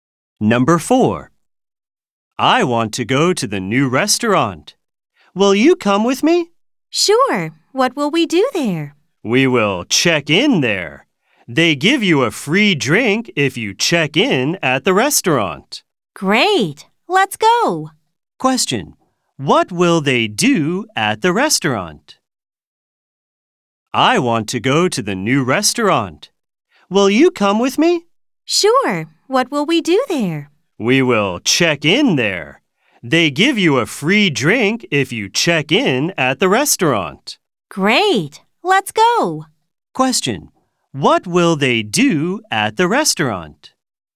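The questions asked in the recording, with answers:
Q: What will they do at the restaurant?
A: They will check in.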